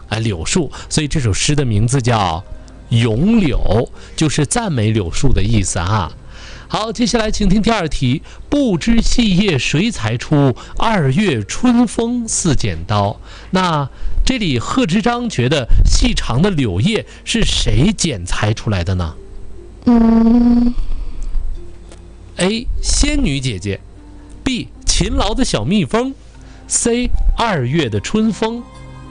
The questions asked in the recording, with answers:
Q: 那这里贺知章觉得细长的柳叶是谁剪裁出来的呢?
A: 对哈,所以呢,这里诗里叫2月春风似剪刀。